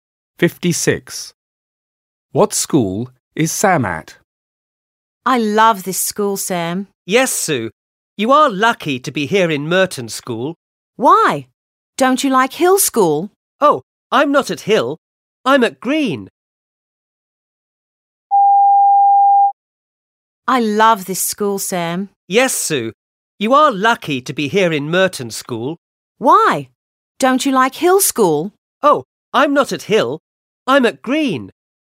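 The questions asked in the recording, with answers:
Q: What school is Sam at?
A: Green School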